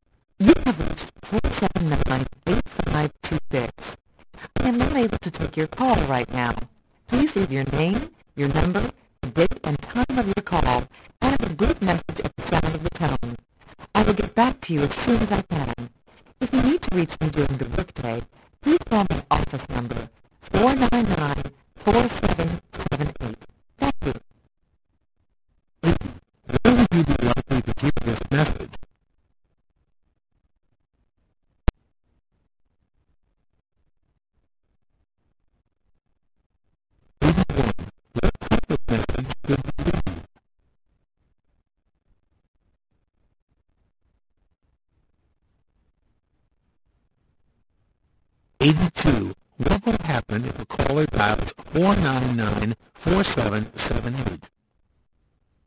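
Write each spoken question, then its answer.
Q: Where would you be likely to hear this message?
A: On an answering machine / voicemail

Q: What will happen if a caller dials 499-4778?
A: They will reach the person's office during the workday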